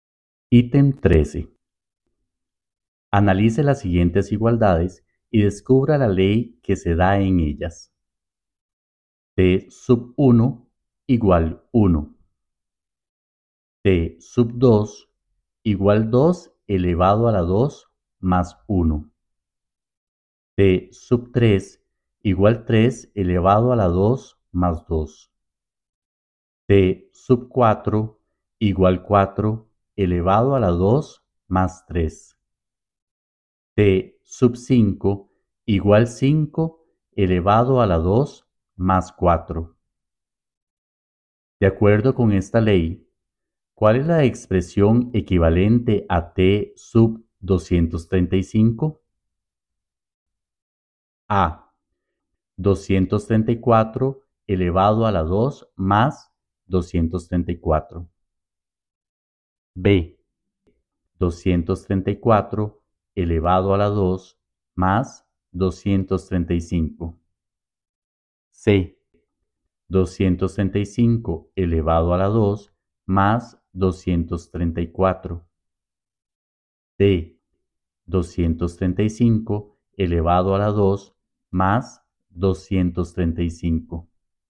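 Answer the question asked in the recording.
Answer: C: 235 elevado a la 2 más 234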